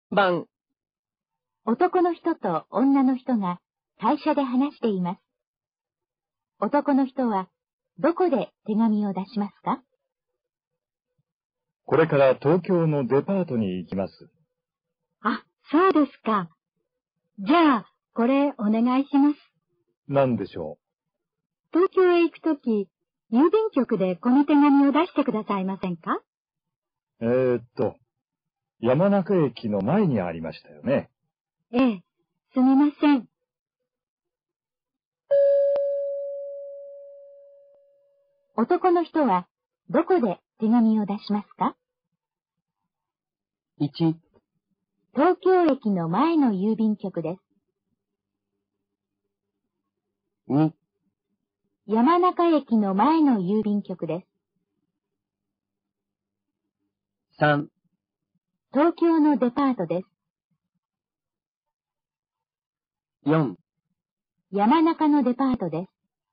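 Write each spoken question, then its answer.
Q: 男の人はどこで手紙を出しますか?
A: 2: 山中駅の前の郵便局です。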